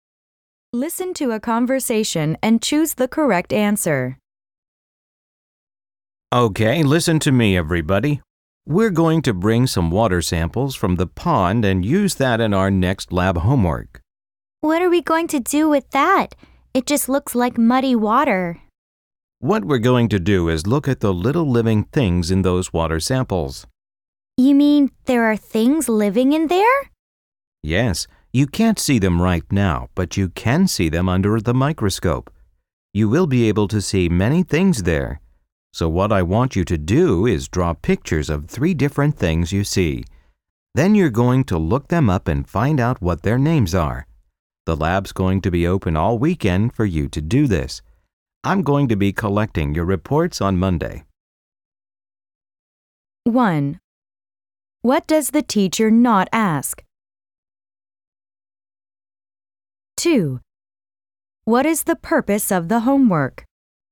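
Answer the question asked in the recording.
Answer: To observe and identify tiny living things in pond water with a microscope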